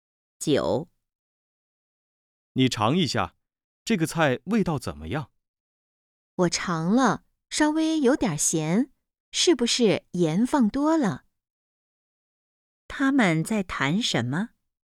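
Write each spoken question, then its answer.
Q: 他们在谈什么?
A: 菜的味道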